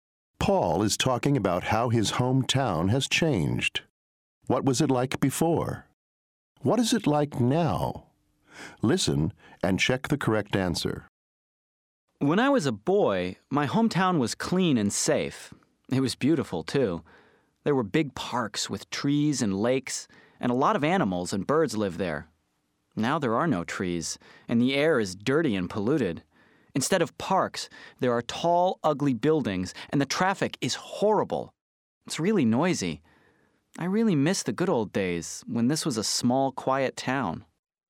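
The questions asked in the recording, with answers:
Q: What was it like before?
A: Clean, safe and beautiful, with big parks

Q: What is it like now?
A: Dirty, polluted and noisy, with tall ugly buildings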